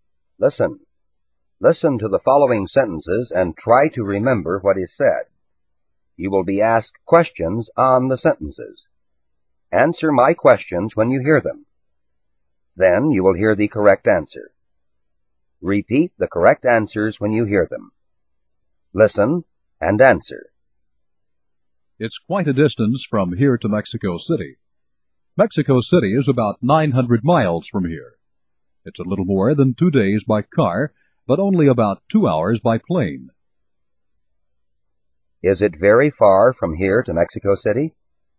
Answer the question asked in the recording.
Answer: Yes, it is. It's quite a distance.